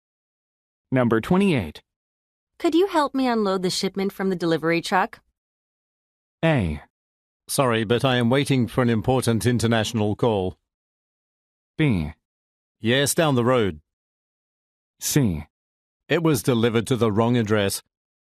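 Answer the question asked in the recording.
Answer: A: Sorry, but I am waiting for an important international call.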